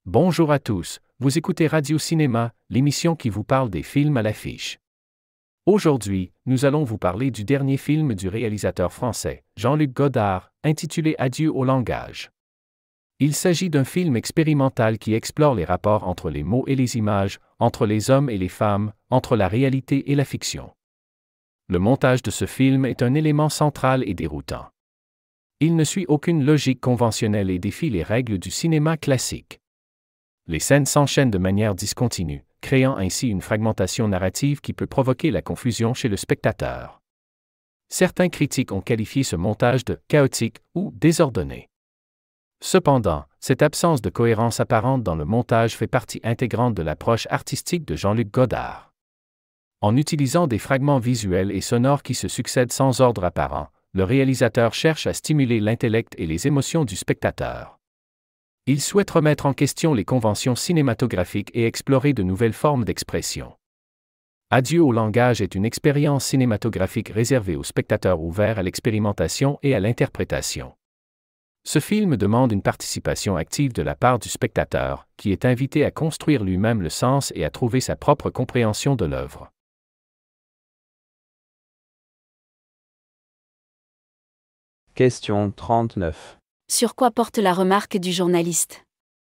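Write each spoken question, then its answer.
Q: Sur quoi porte la remarque du journaliste ?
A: Sur le montage du film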